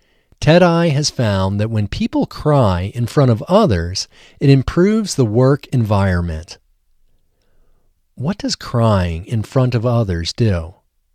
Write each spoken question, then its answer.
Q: What does crying in front of others do?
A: Crying in front of others improves the work environment.